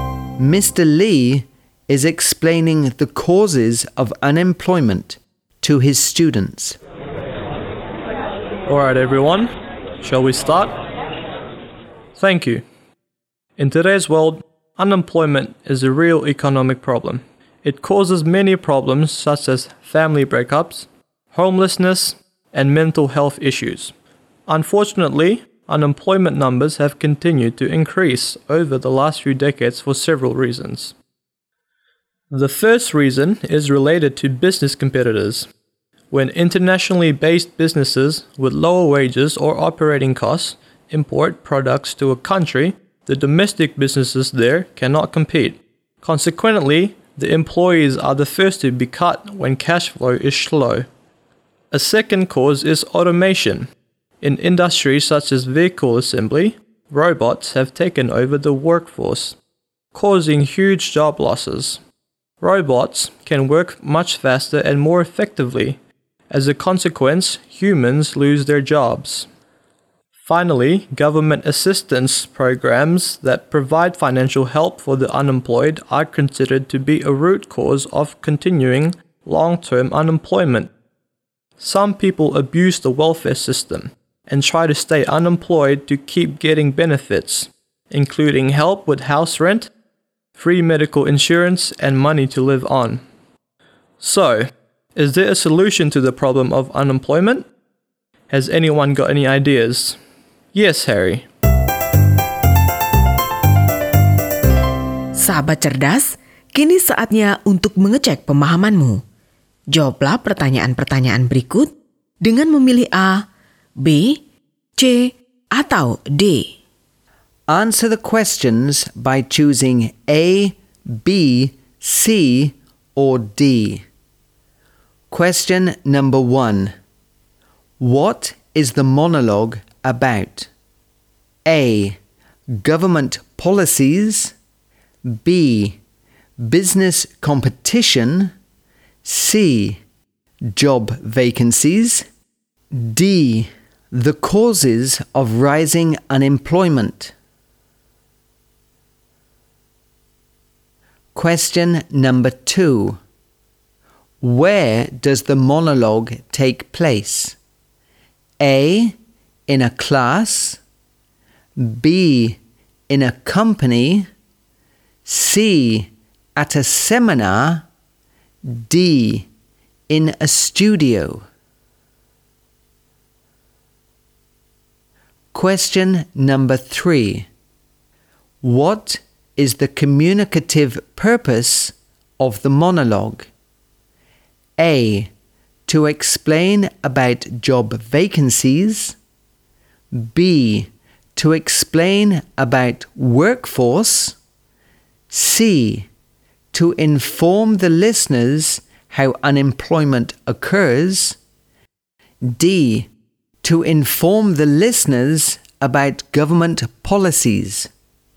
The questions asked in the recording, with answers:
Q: What is the monologue about?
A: D. The causes of rising unemployment.

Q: Where does the monologue take place?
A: A. In a class.

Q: What is the communicative purpose of the monologue?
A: C. To inform the listeners how unemployment occurs.